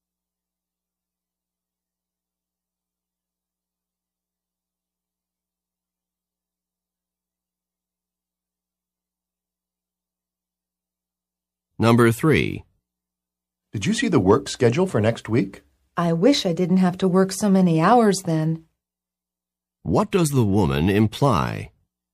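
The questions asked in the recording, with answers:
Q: What does the woman imply?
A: She has to work many hours next week.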